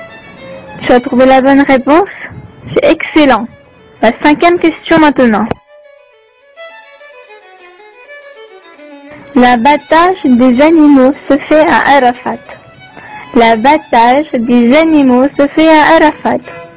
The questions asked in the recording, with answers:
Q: L'abattage des animaux se fait à Arafat.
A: Faux, il se fait à Mina.